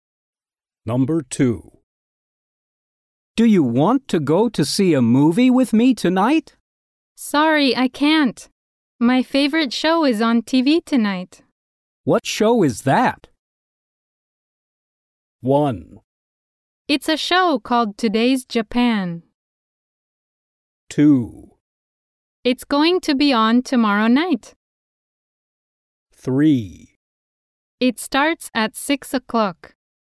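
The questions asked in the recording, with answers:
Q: What show is that?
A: 1: It's a show called Today's Japan.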